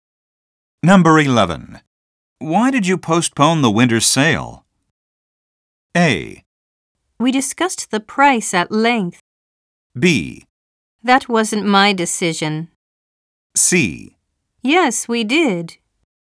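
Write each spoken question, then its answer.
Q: Why did you postpone the winter sale?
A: B: That wasn't my decision.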